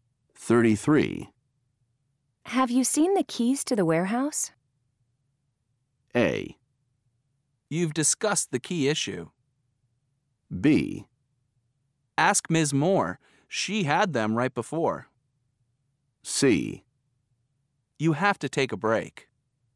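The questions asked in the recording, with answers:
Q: Have you seen the keys to the warehouse?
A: B: Ask Ms. Moore. She had them right before.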